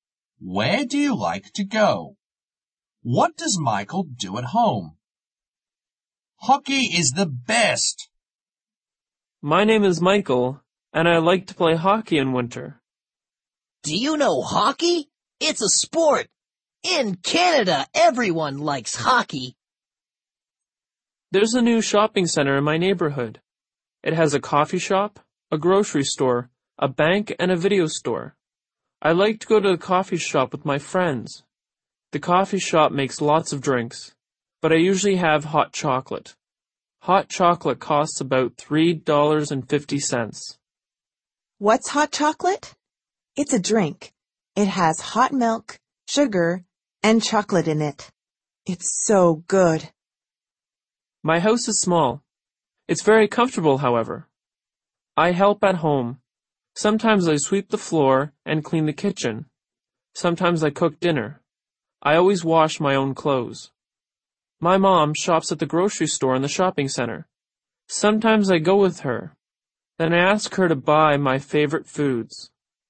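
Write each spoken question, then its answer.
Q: What does Michael do at home?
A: He helps at home: he sometimes sweeps the floor, cleans the kitchen and cooks dinner, and he always washes his own clothes.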